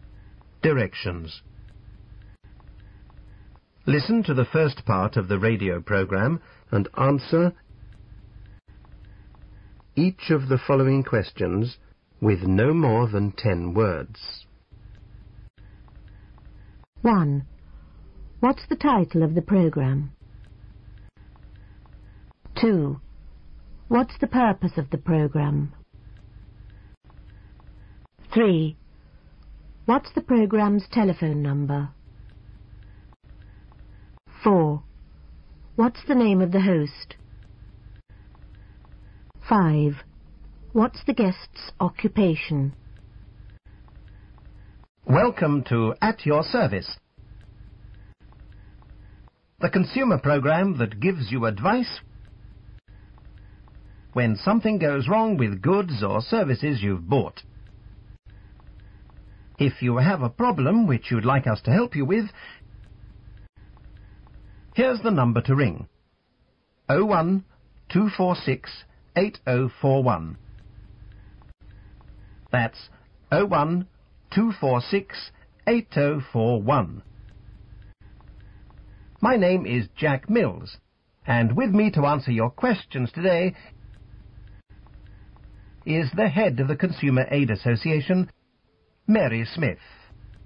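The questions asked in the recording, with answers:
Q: What's the title of the program?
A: At Your Service

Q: What's the purpose of the program?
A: To give consumers advice when something goes wrong with goods or services they've bought

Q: What's the program's telephone number?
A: 01-246-8041

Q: What's the name of the host?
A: Jack Mills

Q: What's the guest's occupation?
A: Head of the Consumer Aid Association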